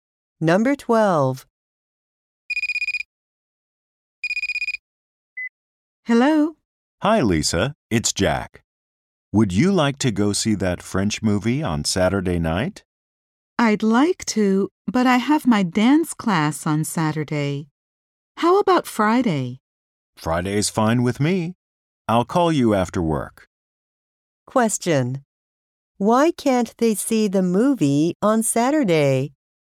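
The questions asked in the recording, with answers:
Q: Why can't they see the movie on Saturday?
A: Lisa has her dance class on Saturday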